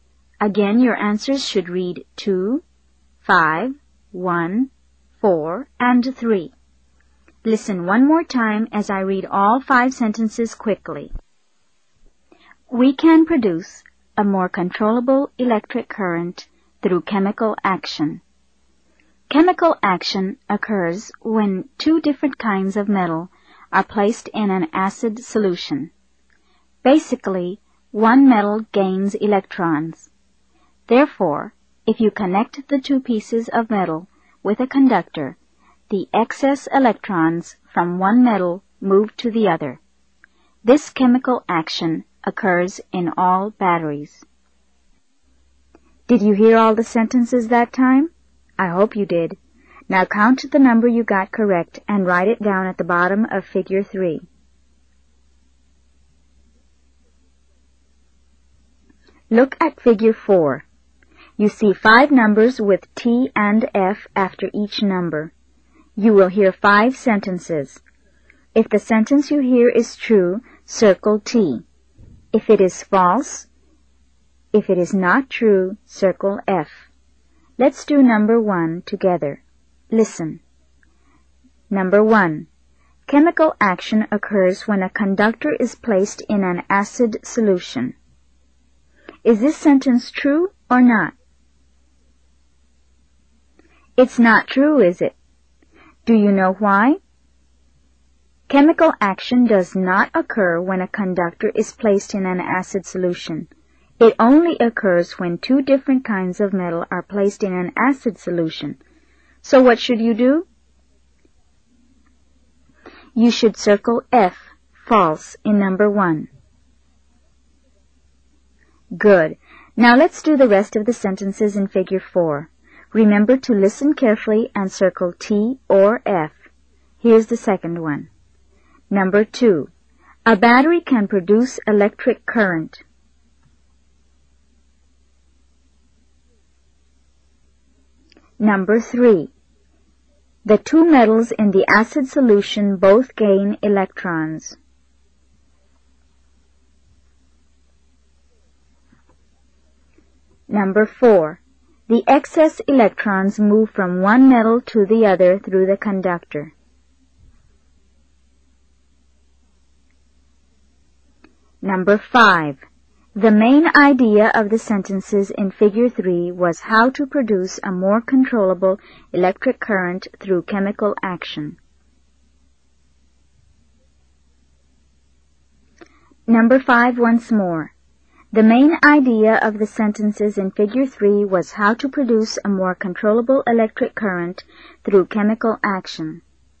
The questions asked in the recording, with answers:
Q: A battery can produce electric current.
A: Number 2 is true.

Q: The two metals in the acid solution both gain electrons.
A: Number 3 is false.

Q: The excess electrons move from one metal to the other through the conductor.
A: Number 4 is true.

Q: The main idea of the sentences in Figure 3 was how to produce a more controllable electric current through chemical action.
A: It is also true.